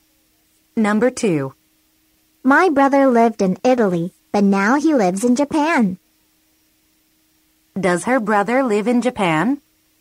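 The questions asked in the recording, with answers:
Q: Does her brother live in Japan?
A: Yes, he does.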